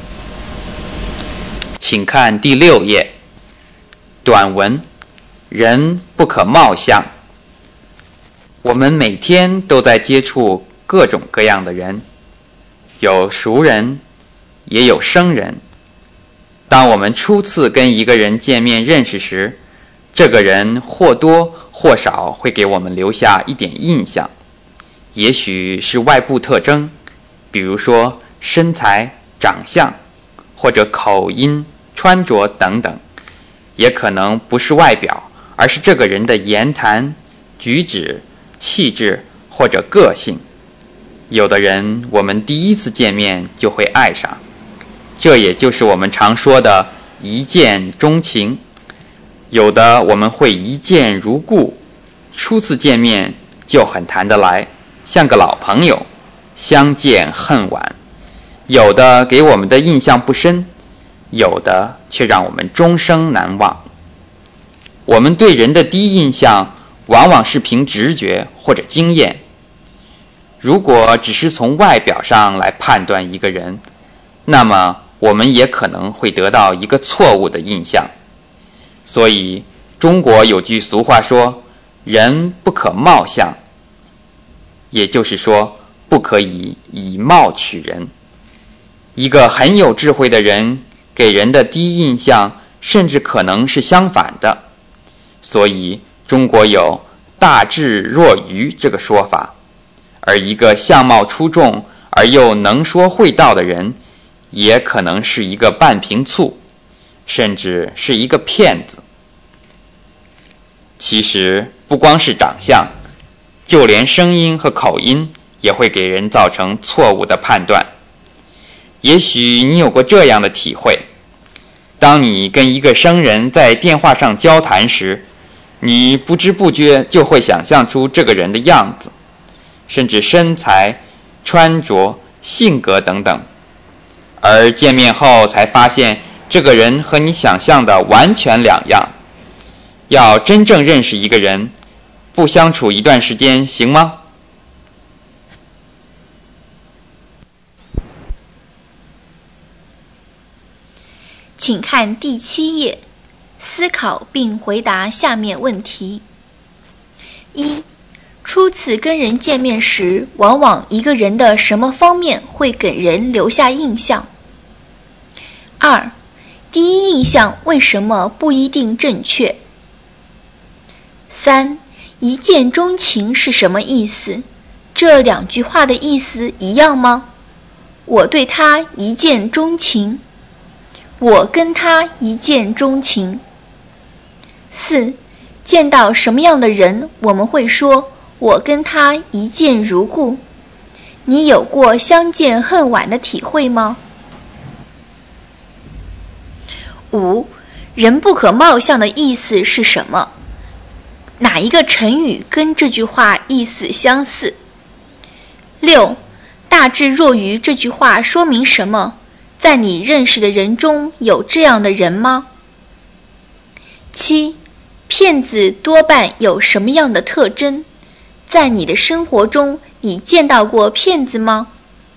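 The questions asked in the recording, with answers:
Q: 初次跟人见面时,往往一个人的什么方面会给人留下印象?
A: 外部特征,如身材、长相、口音、穿着;或言谈、举止、气质、个性

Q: 第一印象为什么不一定正确?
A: 因为第一印象往往凭直觉或经验,只从外表判断一个人可能得到错误的印象

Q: 一见钟情是什么意思?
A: 第一次见面就爱上一个人

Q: 见到什么样的人,我们会说我跟他一见如故。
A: 初次见面就很谈得来、像老朋友一样的人

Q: 人不可貌相的意思是什么?哪一个成语跟这句话意思相似?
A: 不可以凭外表判断一个人;以貌取人(不可以貌取人)

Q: 大智若愚这句话说明什么?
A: 很有智慧的人给人的第一印象可能相反,看起来像是愚笨的

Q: 骗子多半有什么样的特征?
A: 相貌出众,又能说会道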